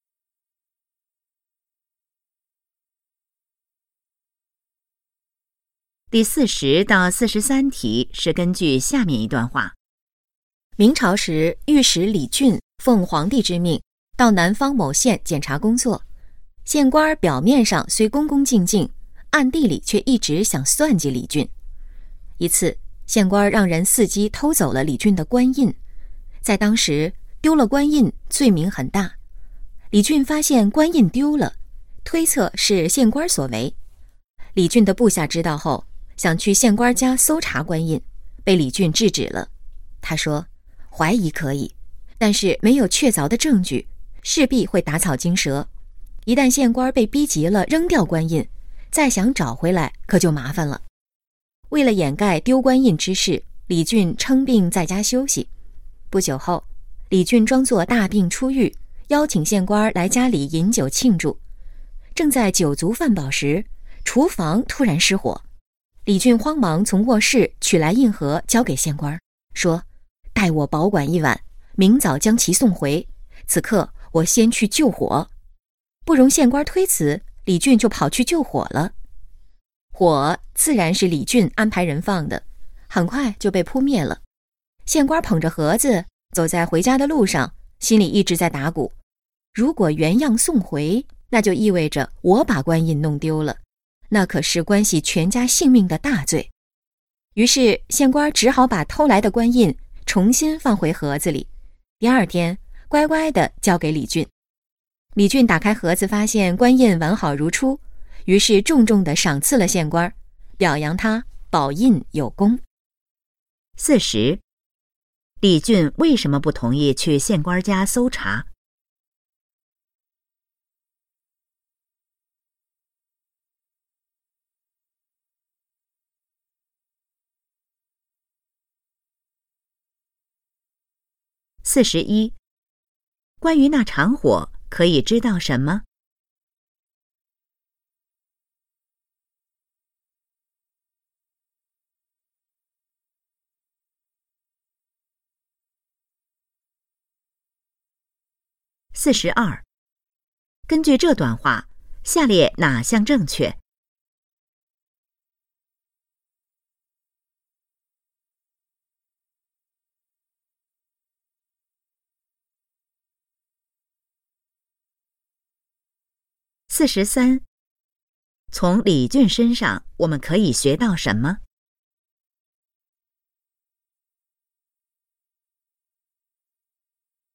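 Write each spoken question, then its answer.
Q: 李俊为什么不同意去县官家搜查?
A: 没有确凿证据,会打草惊蛇

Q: 关于那场火可以知道什么?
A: 是李俊安排人放的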